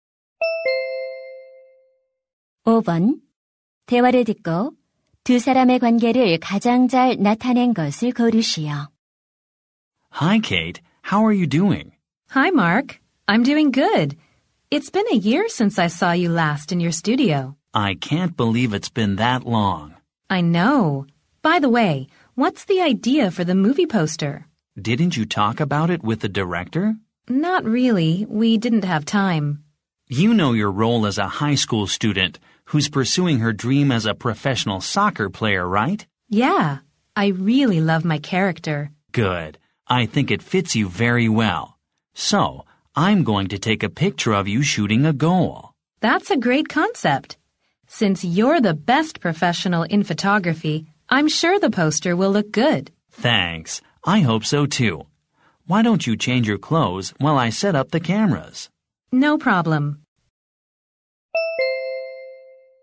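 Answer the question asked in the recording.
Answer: 사진작가 - 영화배우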